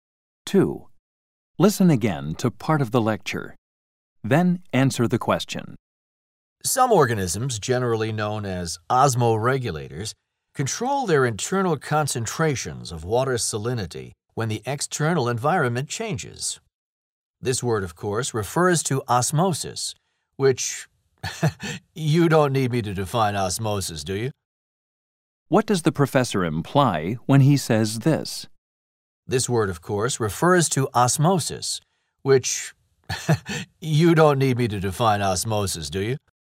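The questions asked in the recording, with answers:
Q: What does the professor imply when he says this?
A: The students should already know what osmosis means, so he doesn't need to define it.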